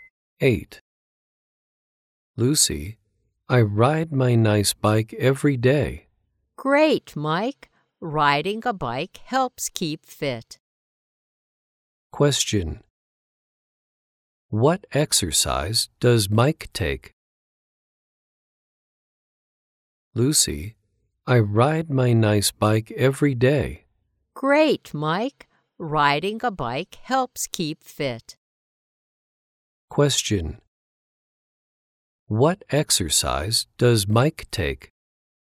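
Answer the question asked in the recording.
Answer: Riding a bike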